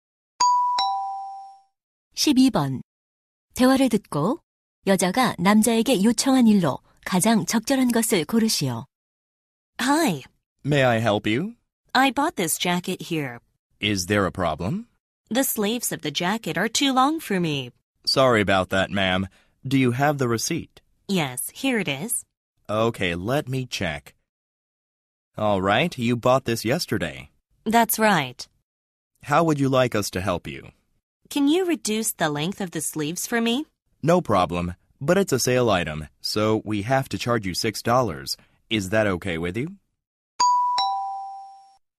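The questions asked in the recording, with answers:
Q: 대화를 듣고 여자가 남자에게 요청한 일로 가장 적절한 것을 고르시오.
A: 재킷 소매 길이 줄이기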